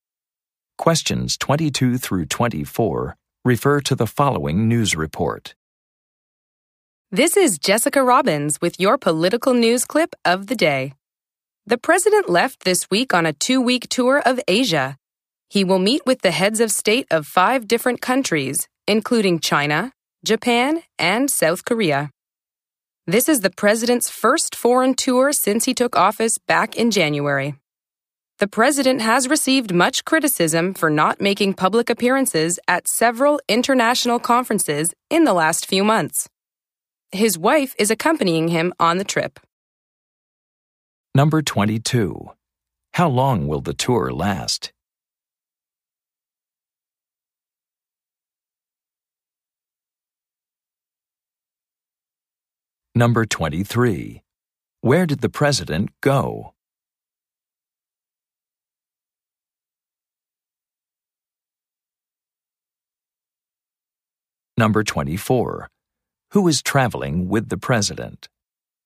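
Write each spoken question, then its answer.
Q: How long will the tour last?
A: Two weeks

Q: Where did the president go?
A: Asia

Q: Who is traveling with the president?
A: His wife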